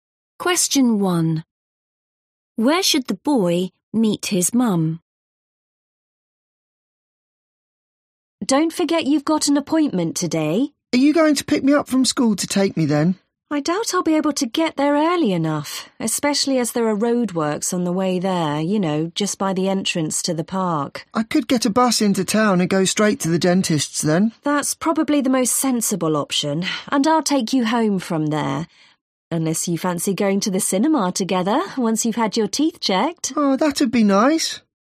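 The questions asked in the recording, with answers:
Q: Where should the boy meet his mum?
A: At the dentist's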